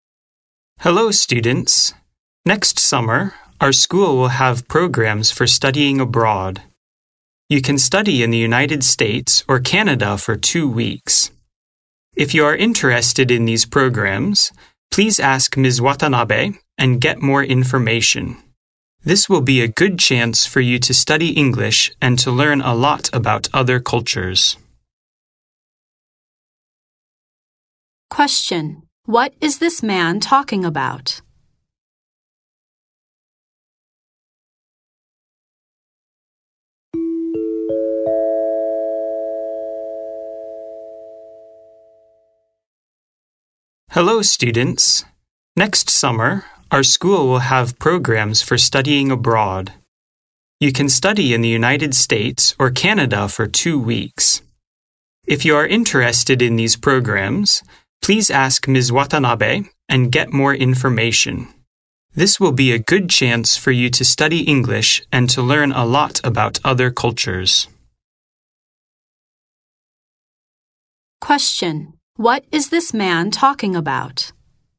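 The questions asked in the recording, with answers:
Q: What is this man talking about?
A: Study abroad programs next summer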